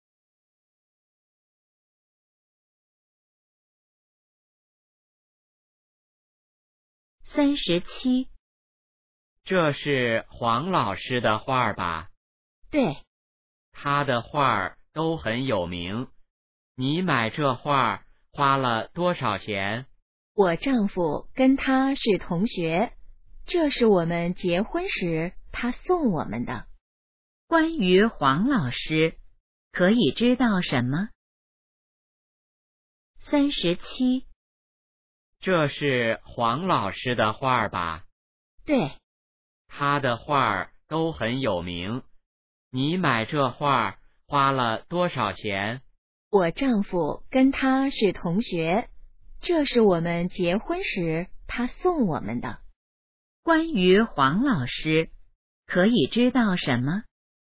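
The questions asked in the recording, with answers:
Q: 关于黄老师,可以知道什么?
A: 他的画很有名,是女的丈夫的同学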